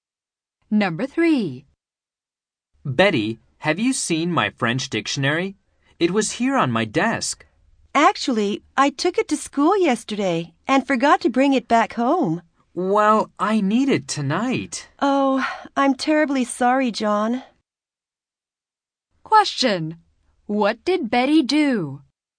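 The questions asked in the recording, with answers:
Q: What did Betty do?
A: She took John's French dictionary to school and forgot to bring it back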